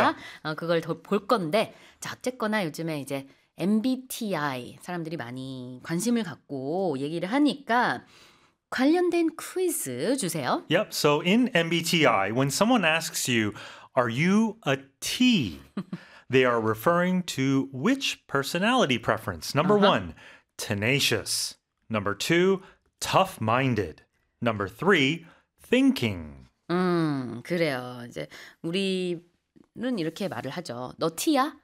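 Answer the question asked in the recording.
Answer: 3: thinking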